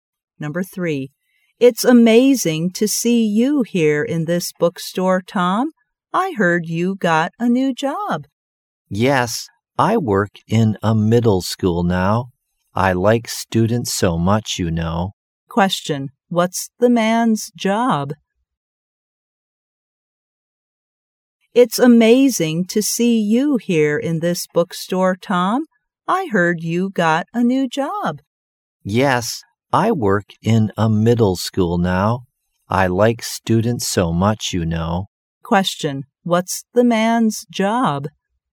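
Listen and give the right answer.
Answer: A teacher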